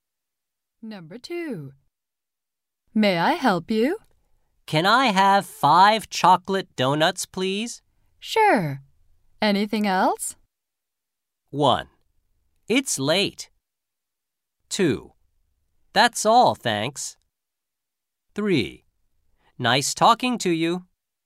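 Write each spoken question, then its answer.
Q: Sure. Anything else?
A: 2: That's all, thanks.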